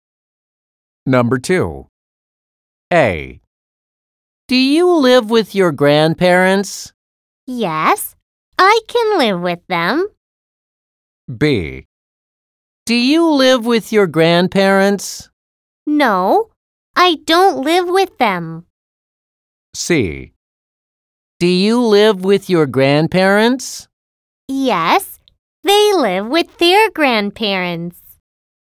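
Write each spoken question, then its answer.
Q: Do you live with your grandparents?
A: B: No, I don't live with them.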